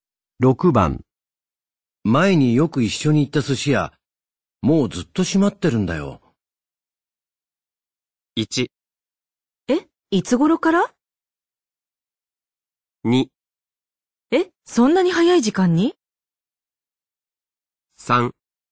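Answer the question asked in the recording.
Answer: 1: え、いつ頃から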